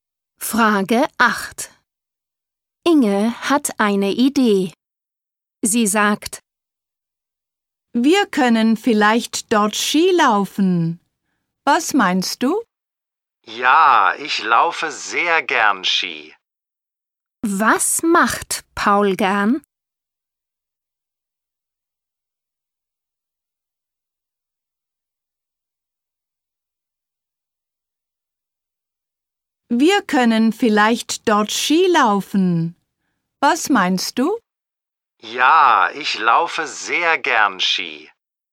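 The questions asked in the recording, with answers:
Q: Was macht Paul gern?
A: Skilaufen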